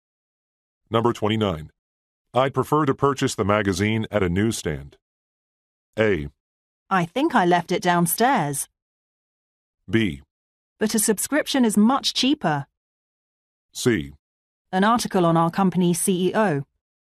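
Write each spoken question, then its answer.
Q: I'd prefer to purchase the magazine at a newsstand.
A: B: But a subscription is much cheaper.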